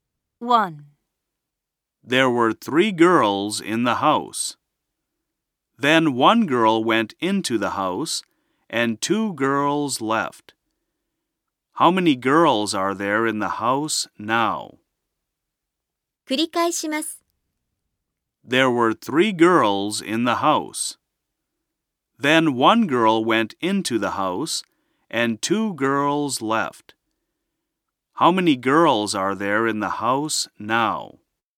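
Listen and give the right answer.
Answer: Two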